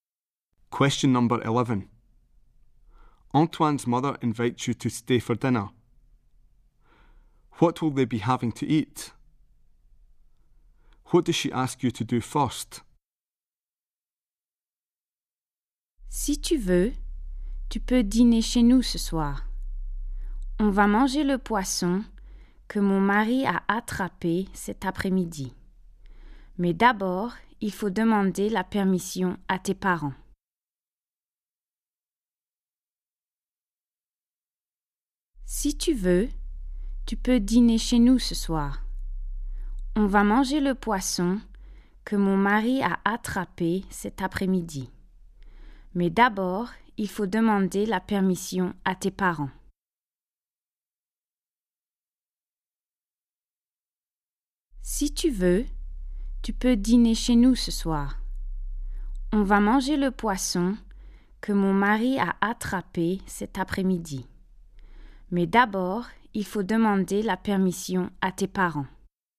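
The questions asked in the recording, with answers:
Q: What will they be having to eat?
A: Fish her husband caught this afternoon

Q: What does she ask you to do first?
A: Ask your parents' permission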